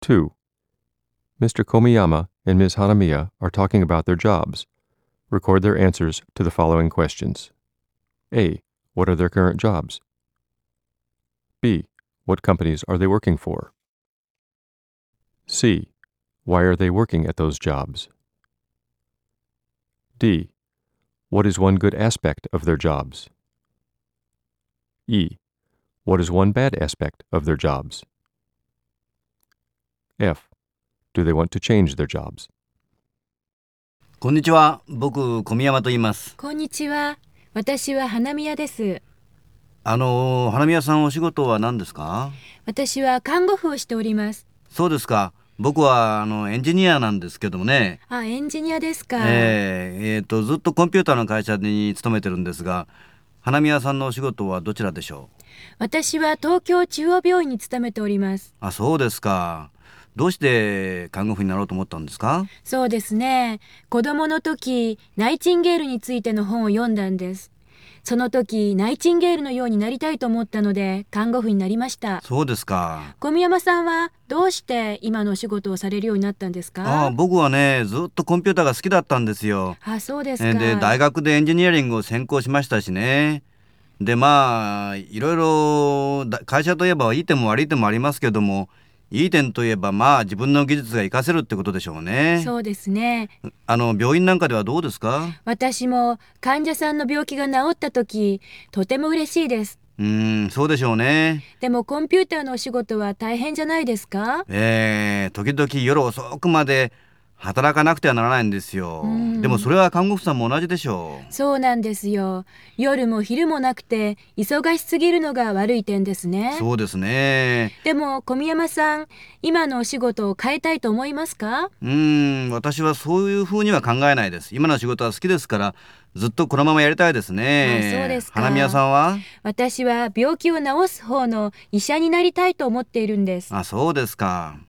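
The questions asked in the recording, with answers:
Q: What are their current jobs?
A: Komiyama: engineer; Hanamiya: nurse

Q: What companies are they working for?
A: Komiyama: a computer company; Hanamiya: Tokyo Central Hospital

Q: Why are they working at those jobs?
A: Komiyama always liked computers and majored in engineering; Hanamiya read a book about Nightingale as a child and wanted to be like her

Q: What is one good aspect of their jobs?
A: Komiyama: he can use his skills; Hanamiya: she is happy when patients get well

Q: What is one bad aspect of their jobs?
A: Both sometimes work late; Hanamiya: too busy, day and night

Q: Do they want to change their jobs?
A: Komiyama: no, he likes his job; Hanamiya: yes, she wants to become a doctor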